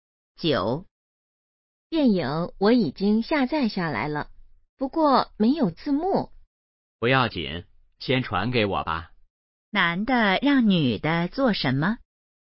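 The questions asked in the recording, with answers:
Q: 男的让女的做什么?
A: 先把电影传给他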